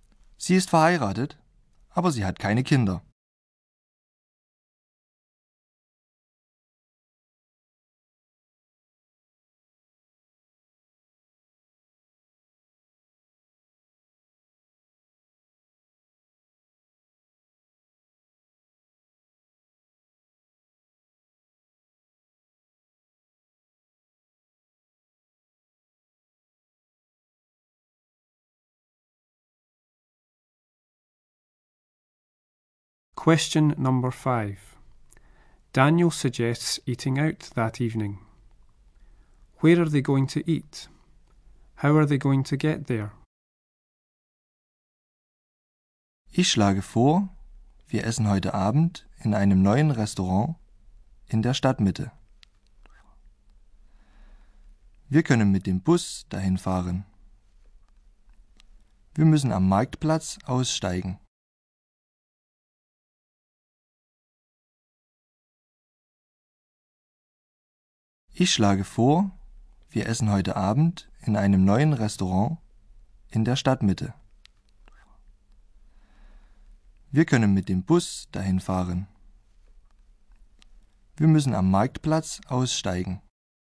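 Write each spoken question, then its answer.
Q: Where are they going to eat?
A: In a new restaurant in the town centre

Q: How are they going to get there?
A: By bus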